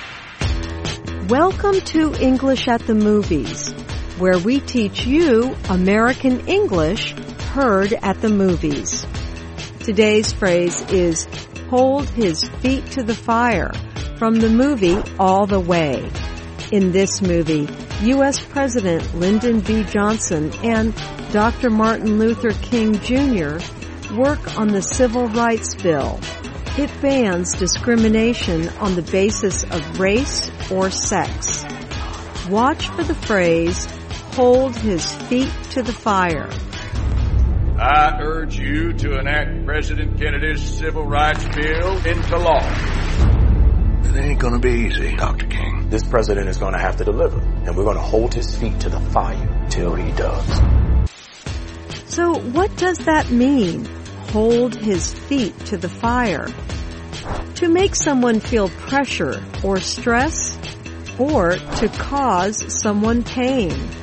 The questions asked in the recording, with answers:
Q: So what does that mean, hold his feet to the fire?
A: To hold someone's feet to the fire means to make someone feel pressure or stress.